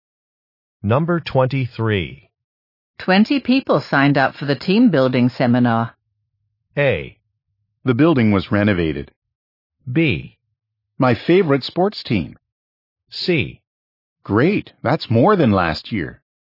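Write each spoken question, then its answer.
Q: 20 people signed up for the team building seminar.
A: C: Great, that's more than last year.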